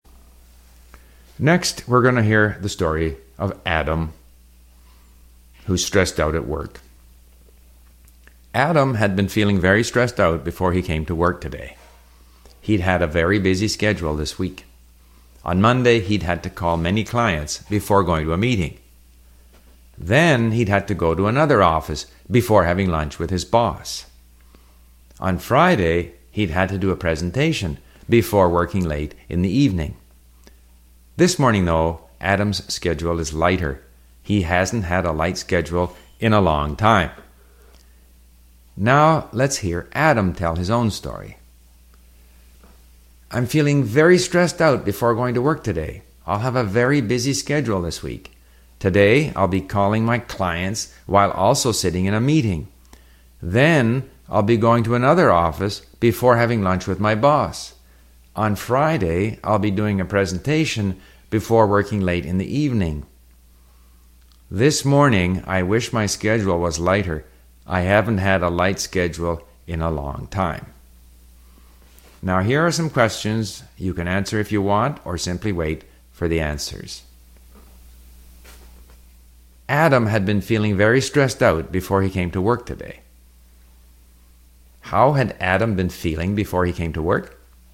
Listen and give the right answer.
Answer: Adam had been feeling very stressed out before he came to work today.